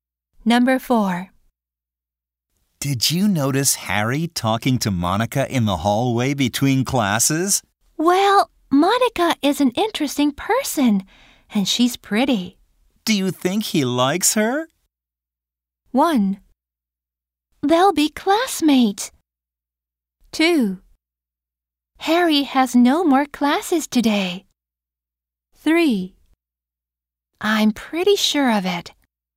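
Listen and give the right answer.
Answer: 3: I'm pretty sure of it.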